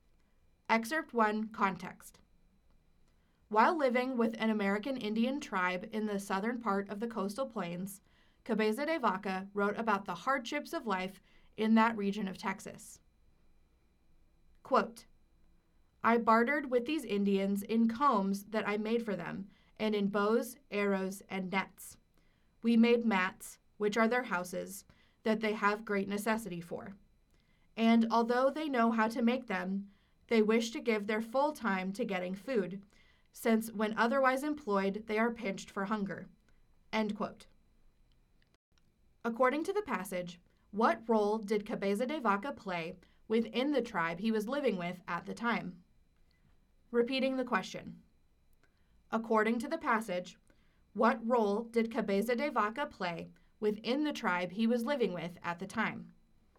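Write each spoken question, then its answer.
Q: According to the passage, what role did Cabeza de Vaca play within the tribe he was living with at the time?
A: He was a trader/barterer who made combs, bows, arrows, nets and mats for them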